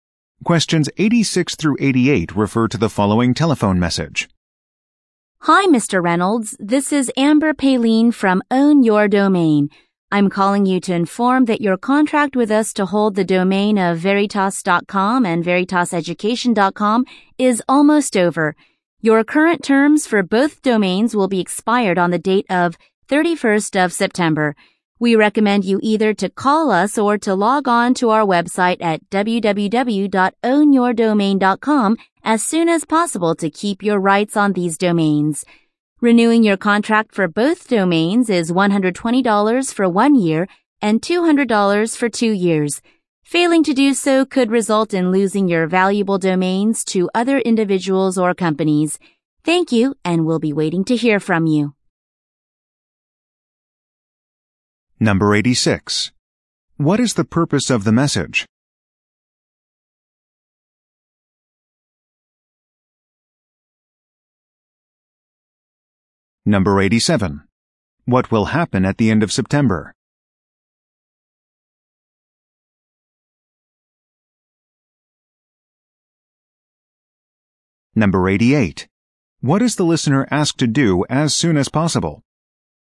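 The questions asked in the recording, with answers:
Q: What is the purpose of the message?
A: To remind him his domain contract is about to expire

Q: What will happen at the end of September?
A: His domain terms will expire

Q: What is the listener asked to do as soon as possible?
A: Call or log on to the website to renew the domains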